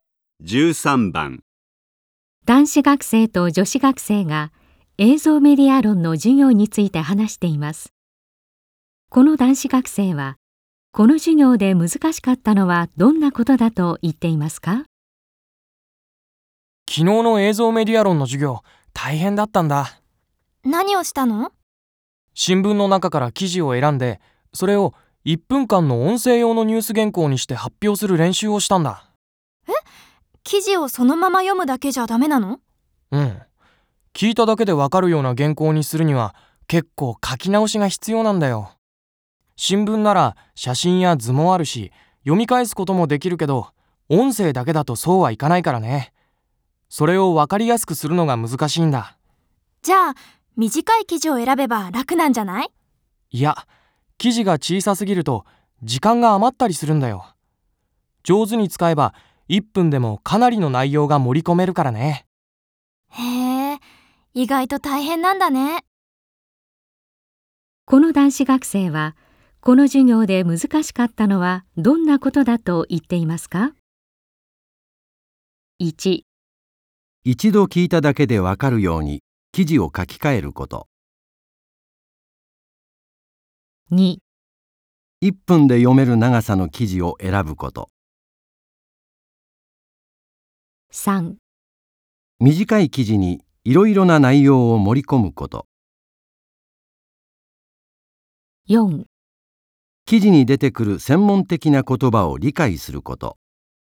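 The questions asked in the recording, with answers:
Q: この男子学生はこの授業で難しかったのはどんなことだと言っていますか?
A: 1: 一度聞いただけでわかるように記事を書き換えること。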